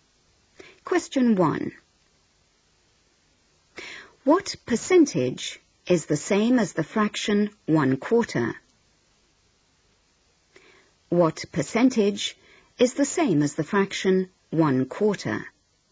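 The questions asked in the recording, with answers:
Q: What percentage is the same as the fraction 1/4?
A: 25%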